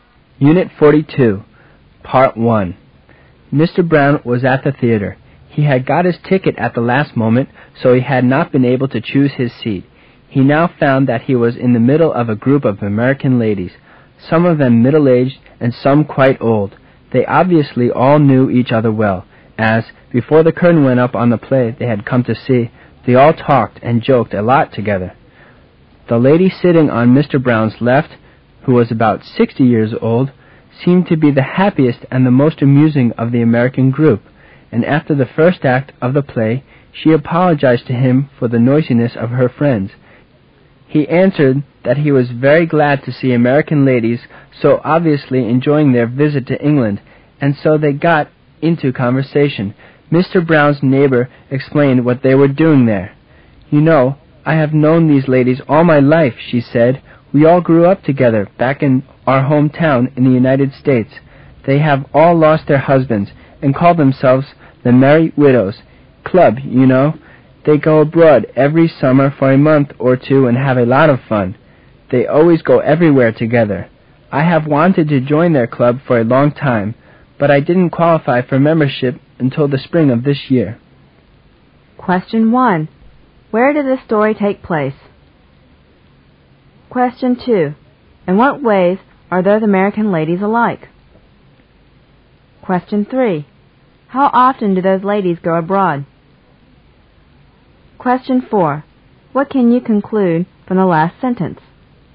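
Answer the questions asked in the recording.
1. In a theater in England
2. They grew up in the same hometown and have all lost their husbands
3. Every summer
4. Her husband died this spring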